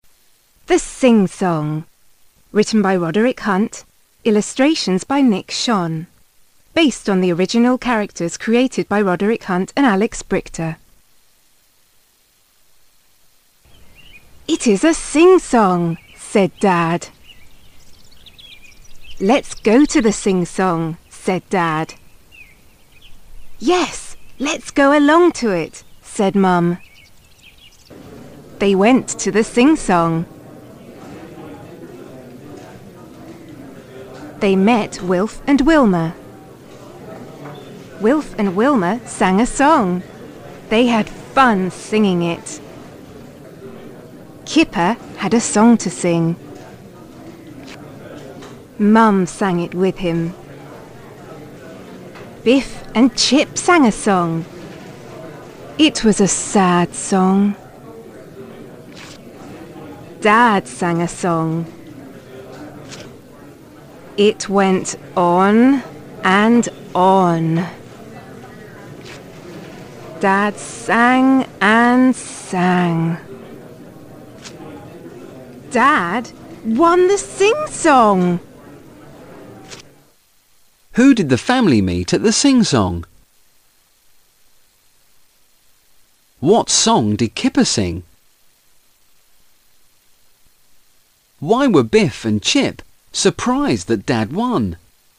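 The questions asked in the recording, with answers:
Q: Who did the family meet at the sing-song?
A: Wilf and Wilma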